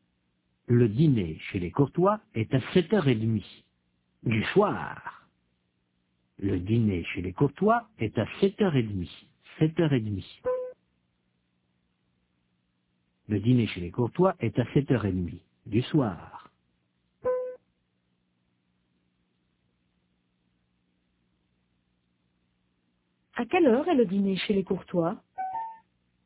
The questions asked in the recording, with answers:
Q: À quelle heure est le dîner chez les Courtois ?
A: À 7h30 du soir.